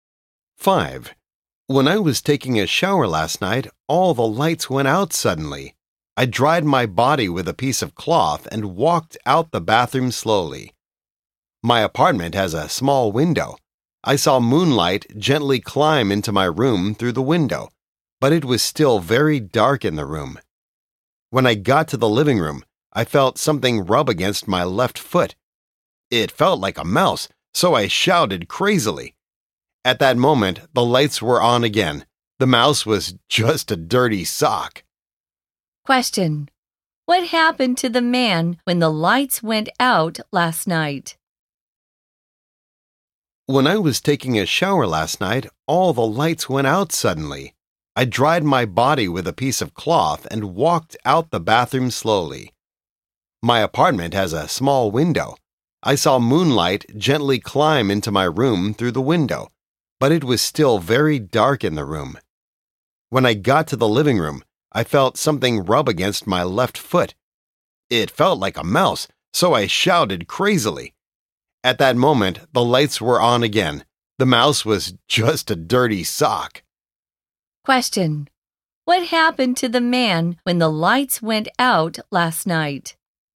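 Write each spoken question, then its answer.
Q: what happened to the man when the lights went out last night?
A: He felt a dirty sock touch his foot, thought it was a mouse, and shouted loudly.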